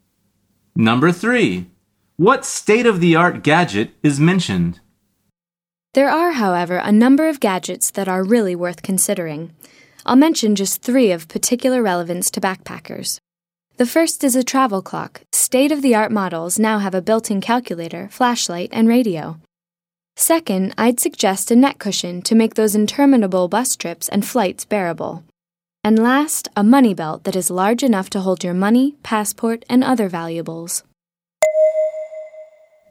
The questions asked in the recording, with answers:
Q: What state-of-the-art gadget is mentioned?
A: The answer is a travel clock.